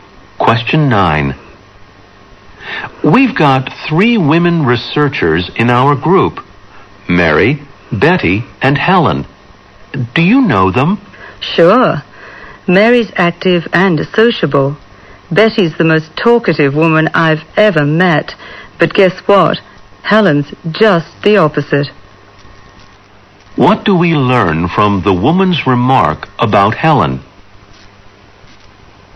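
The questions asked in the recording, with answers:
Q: What do we learn from the woman's remark about Helen?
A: Helen is quiet; she doesn't talk much.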